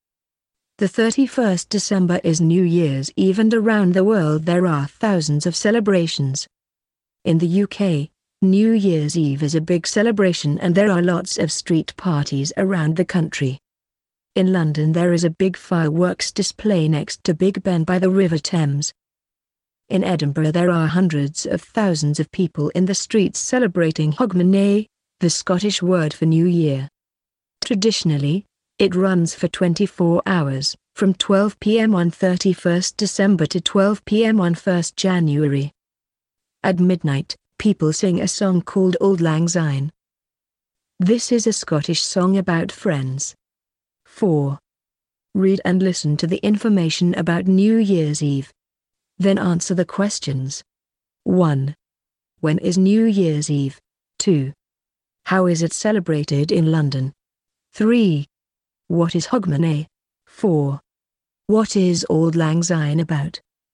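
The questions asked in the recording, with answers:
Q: When is New Year's Eve?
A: The 31st December

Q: How is it celebrated in London?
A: With a big fireworks display next to Big Ben by the River Thames

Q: What is Hogmanay?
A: The Scottish word for New Year

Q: What is Auld Lang Syne about?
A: Friends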